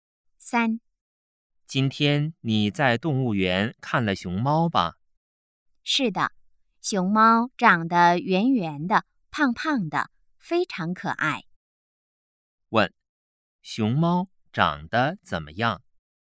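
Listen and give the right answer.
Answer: 圆圆的,胖胖的,非常可爱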